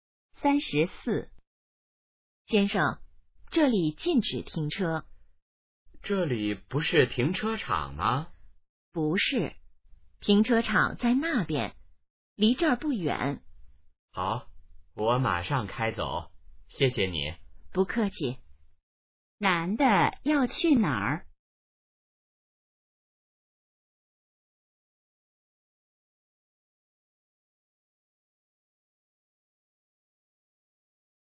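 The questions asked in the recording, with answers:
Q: 男的要去哪儿?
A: 停车场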